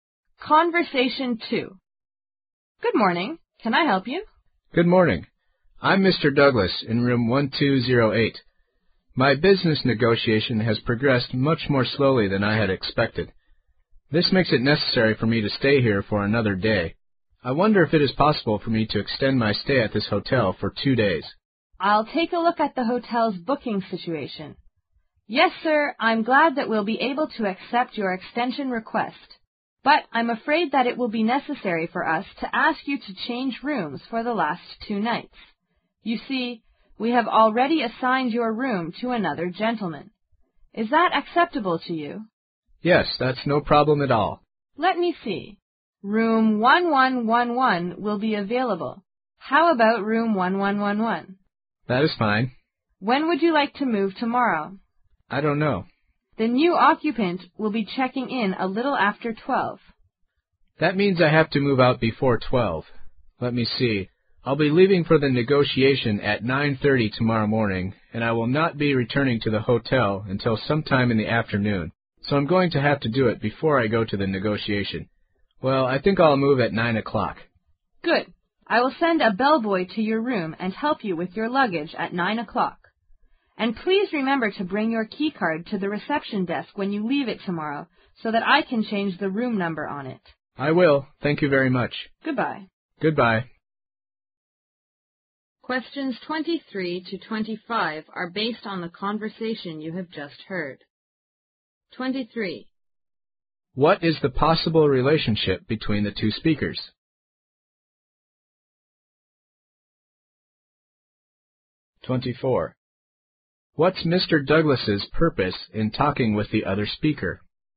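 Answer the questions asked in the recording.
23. Hotel receptionist and guest
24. To extend his stay at the hotel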